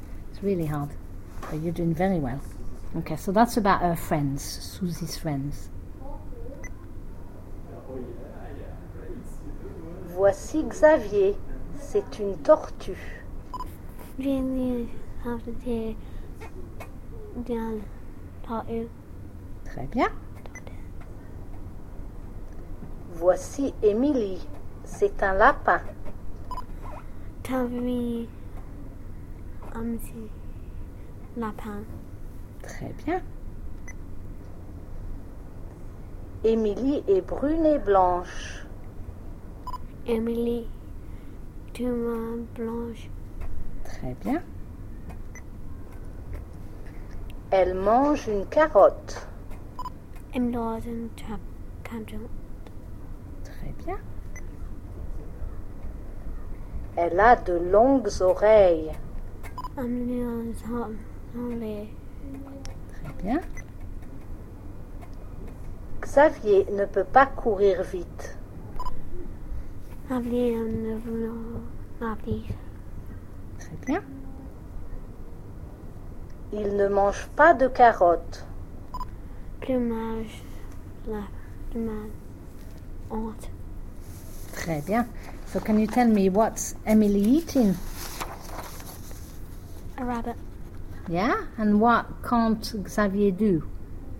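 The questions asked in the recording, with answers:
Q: So can you tell me what's Emily eating?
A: A carrot

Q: And what can't Xavier do?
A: Run fast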